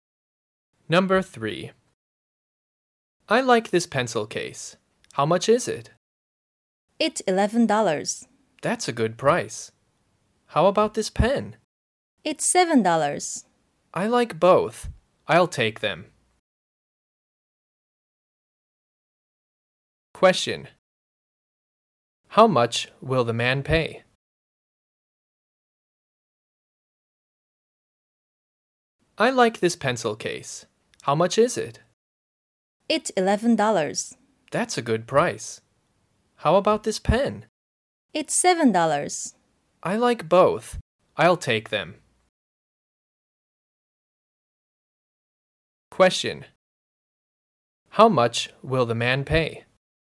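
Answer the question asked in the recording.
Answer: $18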